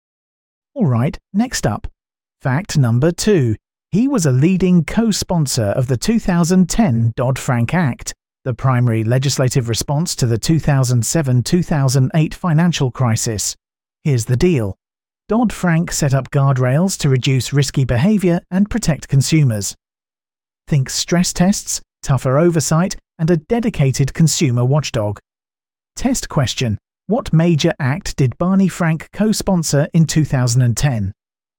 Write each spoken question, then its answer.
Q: What major act did Barney Frank co-sponsor in 2010?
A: The Dodd-Frank Act.